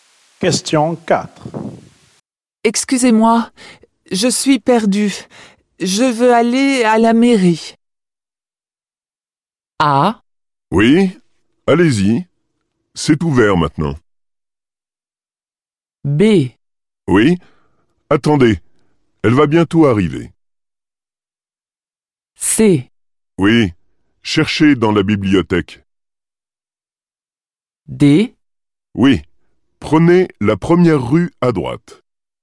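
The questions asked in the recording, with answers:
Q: Excusez-moi, je suis perdu. Je veux aller à la mairie.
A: D: Oui, prenez la première rue à droite.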